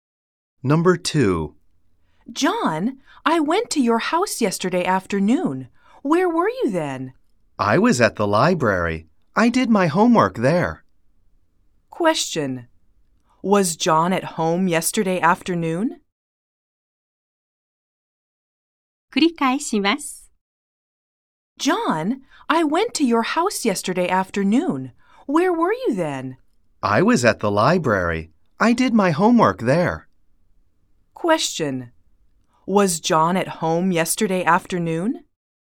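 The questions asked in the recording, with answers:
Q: Was John at home yesterday afternoon?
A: No, he wasn't. He was at the library.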